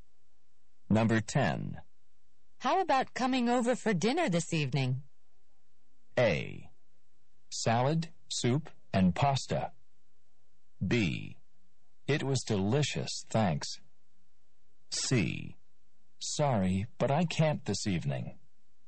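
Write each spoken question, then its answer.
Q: How about coming over for dinner this evening?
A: C: Sorry, but I can't this evening.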